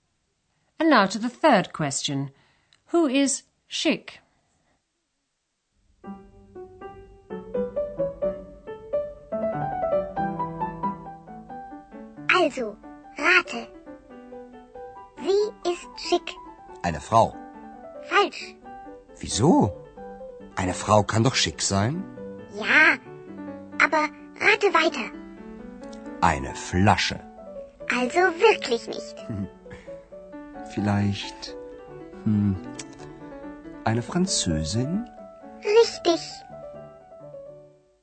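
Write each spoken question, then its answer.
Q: Who is Schick?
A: A French woman (eine Französin)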